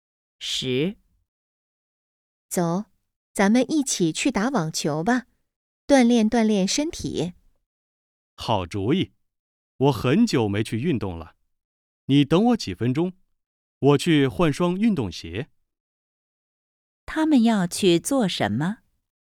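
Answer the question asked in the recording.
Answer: 打网球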